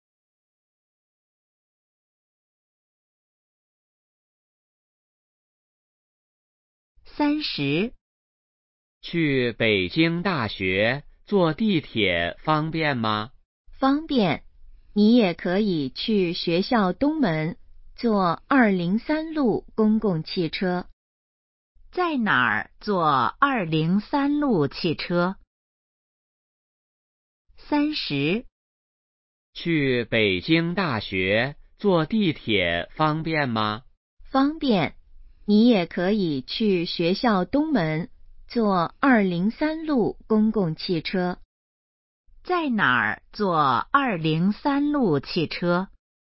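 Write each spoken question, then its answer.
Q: 在哪儿坐203路汽车?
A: 学校东门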